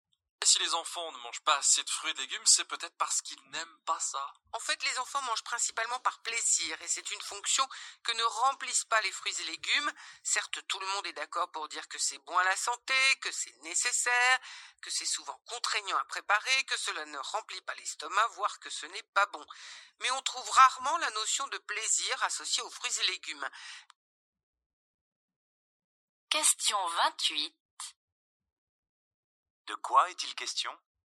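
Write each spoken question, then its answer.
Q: De quoi est-il question ?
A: Des enfants qui ne mangent pas assez de fruits et légumes parce qu'ils n'y associent pas de plaisir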